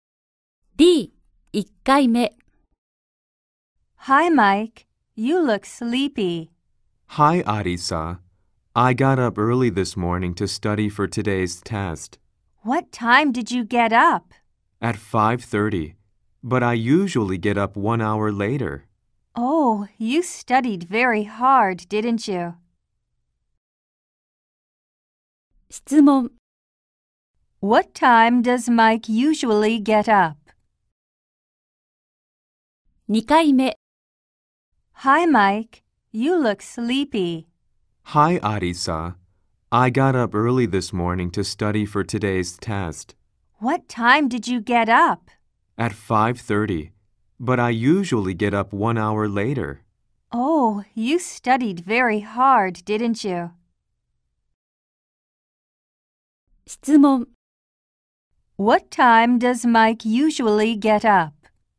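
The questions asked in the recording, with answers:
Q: What time does Mike usually get up?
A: At 6:30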